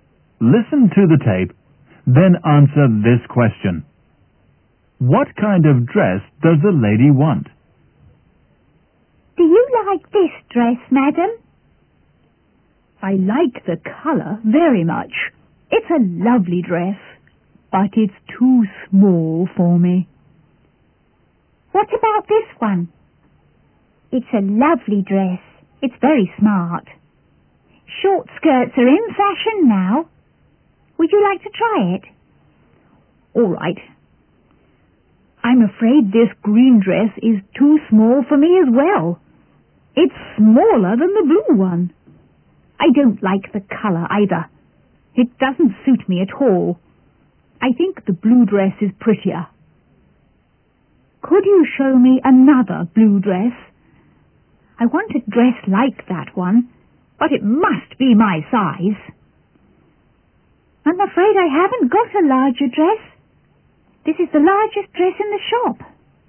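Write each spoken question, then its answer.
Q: What kind of dress does the lady want?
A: A blue dress like the first one, but in her size (larger)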